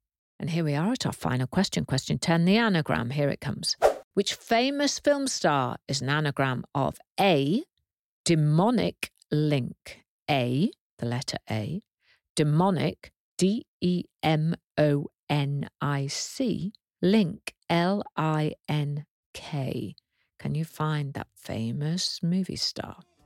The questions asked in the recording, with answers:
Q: Which famous film star is an anagram of A, demonic link, A, the letter A, demonic, D-E-M-O-N-I-C, link, L-I-N-K.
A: She is Nicole Kidman.